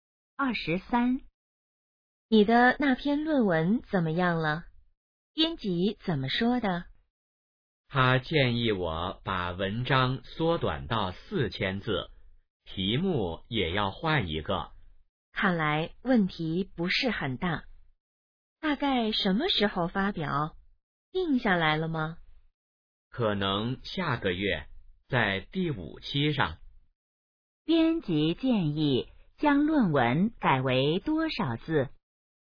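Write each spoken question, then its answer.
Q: 编辑建议将论文改为多少字?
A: 4000字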